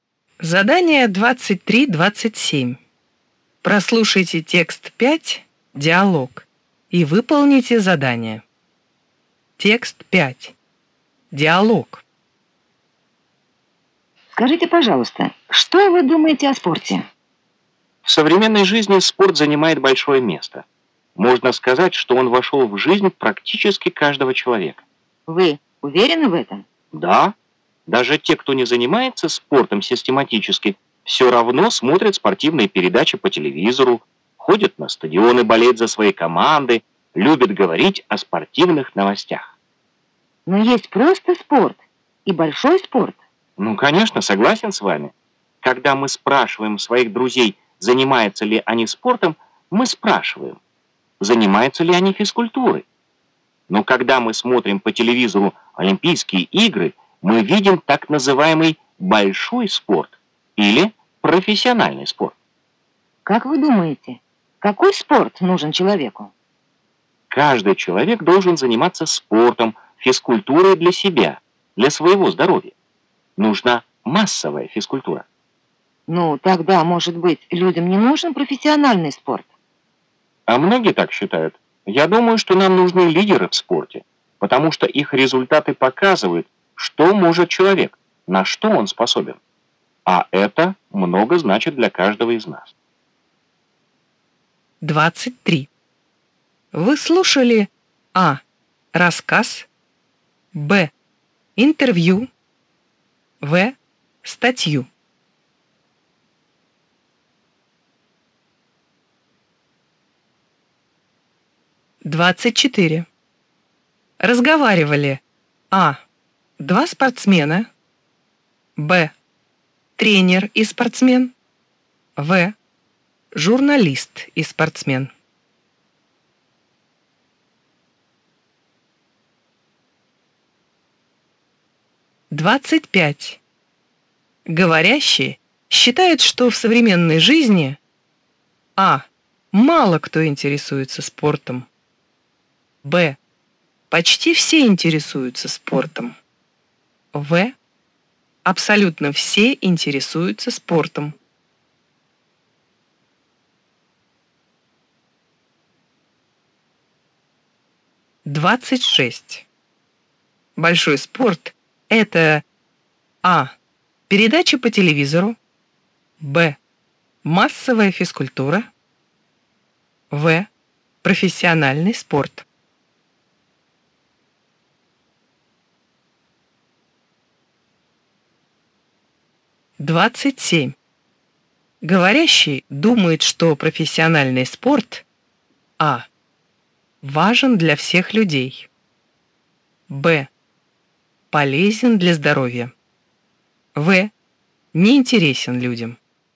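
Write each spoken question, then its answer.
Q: Вы слушали А. Рассказ, Б. Интервью, В. Статью.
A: Б: Интервью

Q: Говорящие считают, что в современной жизни А. Мало кто интересуется спортом, Б. Почти все интересуются спортом. В. Абсолютно все интересуются спортом.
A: Б: Почти все интересуются спортом

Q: Большой спорт – это А. Передачи по телевизору, Б. Массовая физкультура, В. Профессиональный спорт.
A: В: Профессиональный спорт

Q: Говорящий думает, что профессиональный спорт А. Важен для всех людей, Б. Полезен для здоровья, В. Неинтересен людям.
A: А: Важен для всех людей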